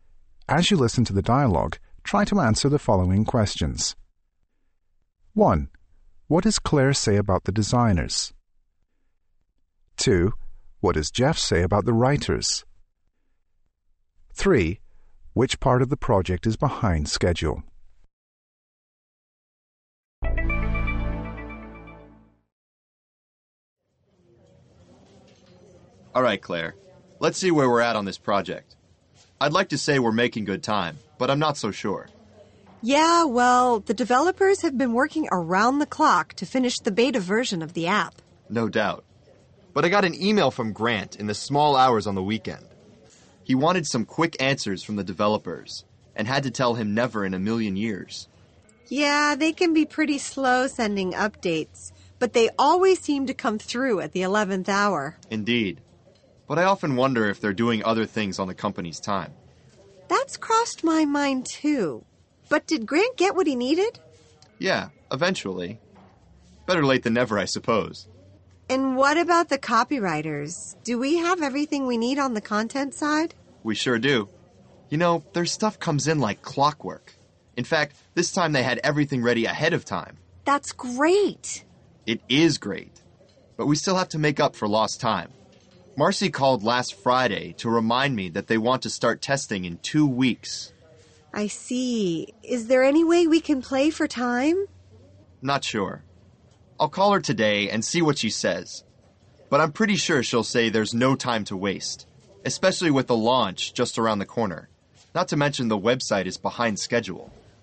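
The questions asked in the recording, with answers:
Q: What does Jeff say about the writers?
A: Their work comes in like clockwork; this time it was ready ahead of time.

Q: Which part of the project is behind schedule?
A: The website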